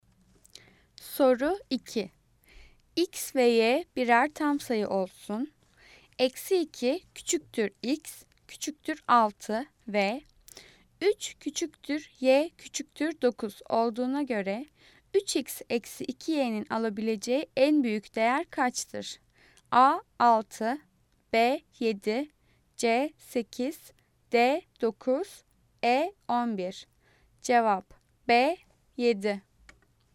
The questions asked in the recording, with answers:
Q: Eksi 2 küçüktür X, küçüktür 6 ve 3 küçüktür Y, küçüktür 9 olduğuna göre 3X eksi 2Y'nin alabileceği en büyük değer kaçtır?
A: Cevap B 7.